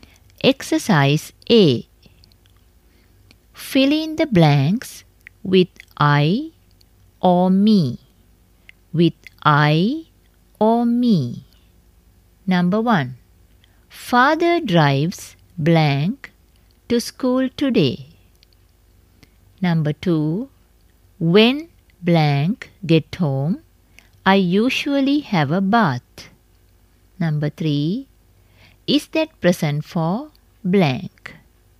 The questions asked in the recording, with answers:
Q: Father drives blank to school today.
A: Father drives me to school today.

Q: When blank get home, I usually have a bath.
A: the answer is I.

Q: Is that present for blank?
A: The answer is me.